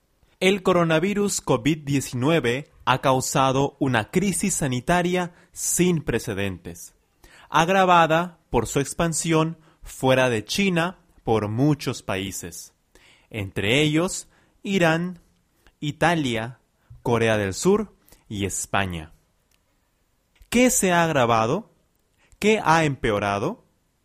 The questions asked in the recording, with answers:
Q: ¿Qué se ha agravado?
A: la crisis sanitaria. Se ha agravado la crisis sanitaria.